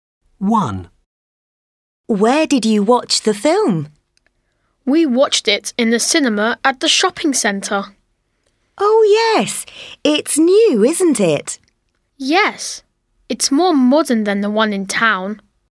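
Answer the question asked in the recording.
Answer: in the cinema at the shopping centre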